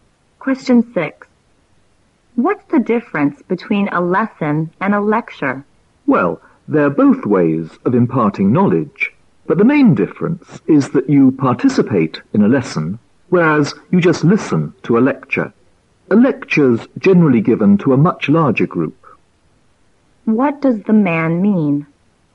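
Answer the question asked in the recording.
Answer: Students take part in a lesson but only listen to a lecture, which is given to a larger group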